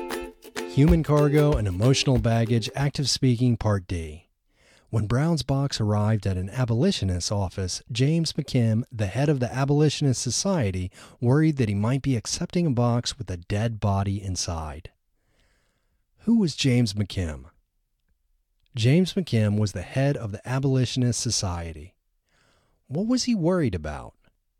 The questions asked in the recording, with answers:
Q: What was he worried about?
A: He was worried that he might be accepting a box with a dead body inside.